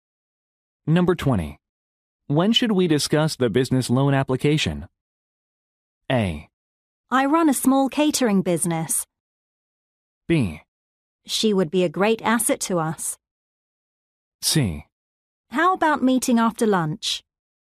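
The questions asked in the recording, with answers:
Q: When should we discuss the business loan application?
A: C: How about meeting after lunch?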